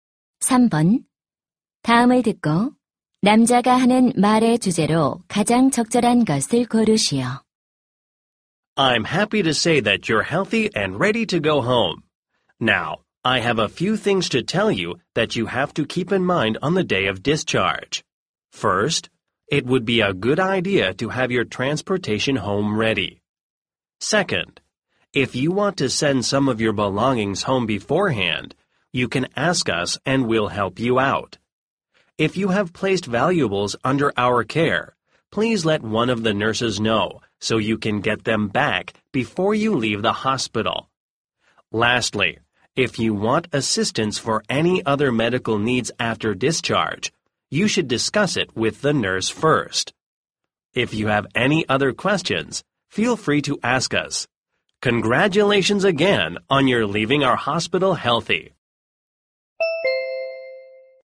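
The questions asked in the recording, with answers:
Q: 다음을 듣고 남자가 하는 말의 주제로 가장 적절한 것을 고르시오.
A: 퇴원 시 유의 사항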